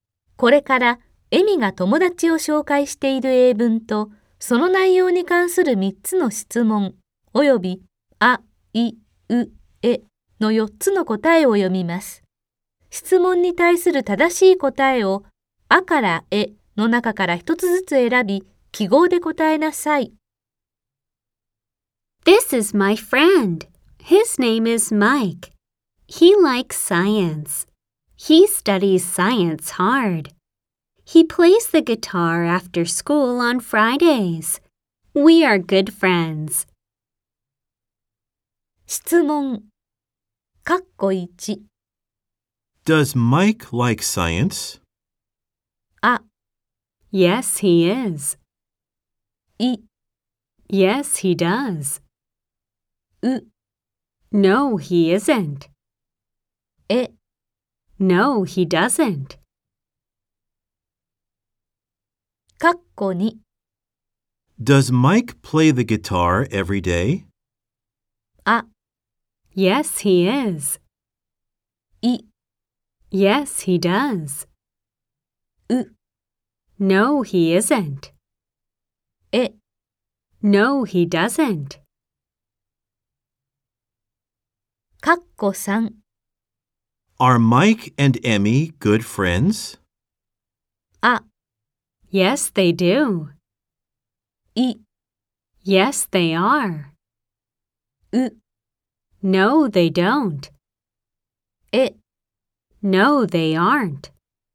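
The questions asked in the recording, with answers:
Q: Does Mike like science?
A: い: Yes, he does.

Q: Does Mike play the guitar every day?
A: え: No, he doesn't.

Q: Are Mike and Emmy good friends?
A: い: Yes, they are.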